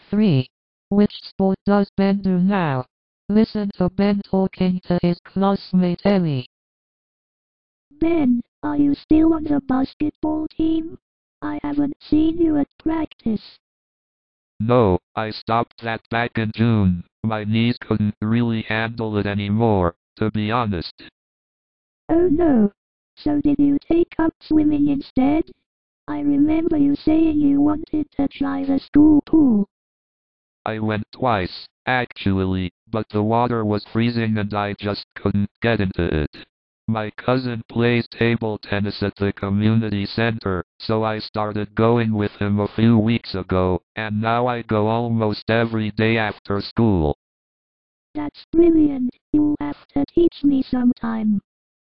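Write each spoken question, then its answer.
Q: Which sport does Ben do now?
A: table tennis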